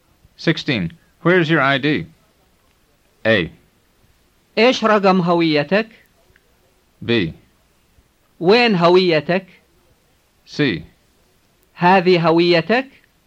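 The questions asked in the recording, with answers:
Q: Where is your ID?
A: B: وين هويتك؟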